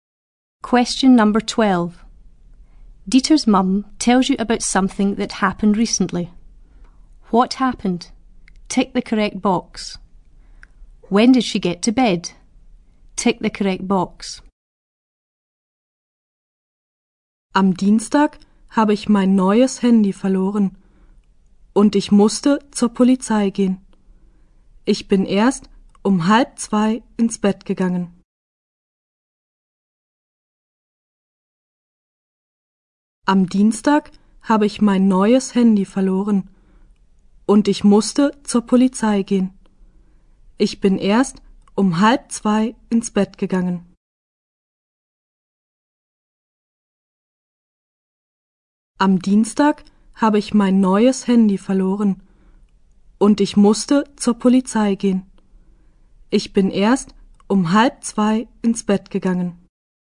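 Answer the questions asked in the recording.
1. She lost her new mobile phone and had to go to the police
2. At 2:30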